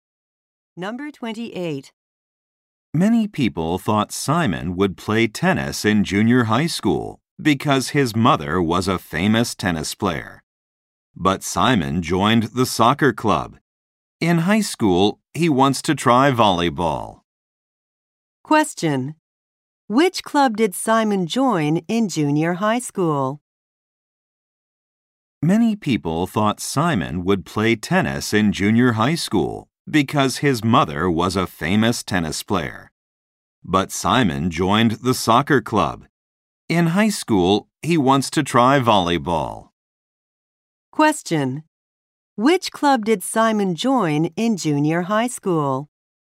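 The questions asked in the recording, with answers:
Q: Which club did Simon join in junior high school?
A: The soccer club.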